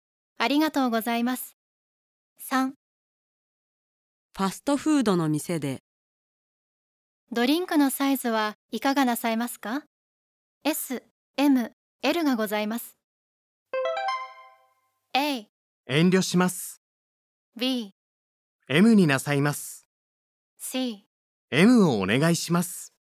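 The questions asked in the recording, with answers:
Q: ドリンクのサイズはいかがなさいますか? S、M、L がございます。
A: C: M をお願いします。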